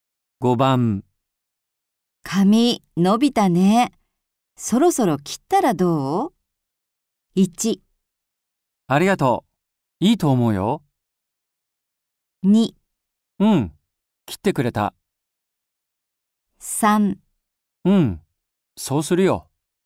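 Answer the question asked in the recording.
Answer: 3: うん、そうするよ。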